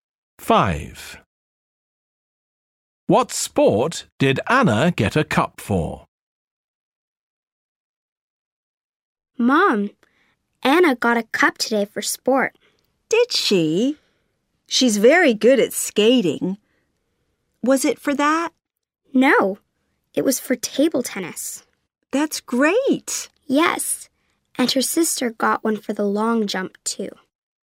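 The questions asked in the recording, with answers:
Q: What sport did Anna get a cup for?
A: Table tennis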